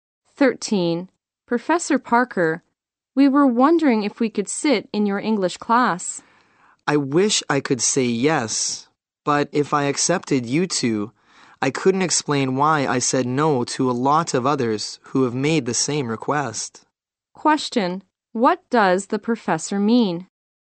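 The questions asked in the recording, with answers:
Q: What does the professor mean?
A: He can't let them sit in on his class.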